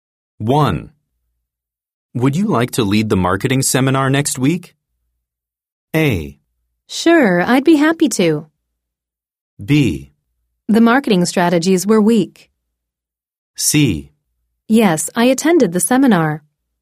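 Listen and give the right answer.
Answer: A: Sure, I'd be happy to.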